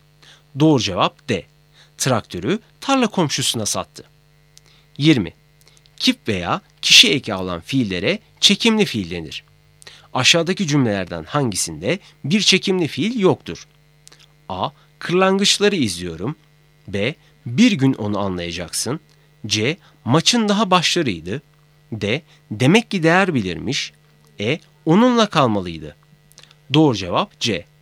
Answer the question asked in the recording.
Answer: Doğru cevap C.